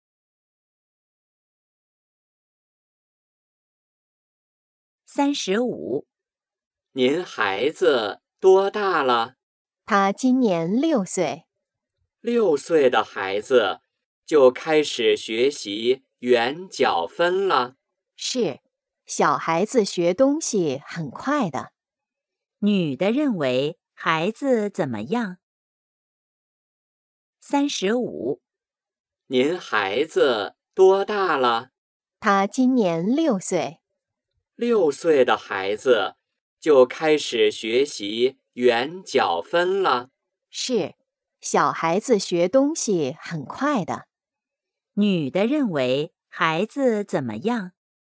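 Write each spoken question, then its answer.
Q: 女的认为孩子怎么样?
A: 学东西很快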